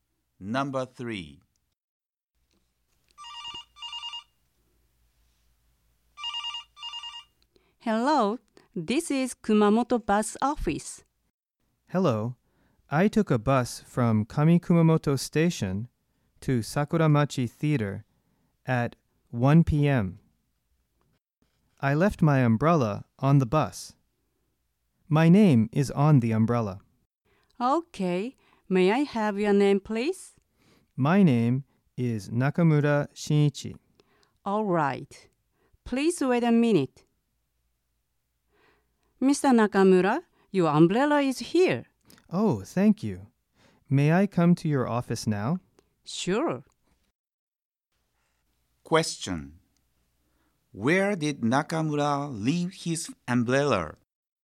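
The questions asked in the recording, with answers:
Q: Where did Nakamura leave his umbrella?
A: On the bus (from Kami-Kumamoto Station to Sakuramachi Theater)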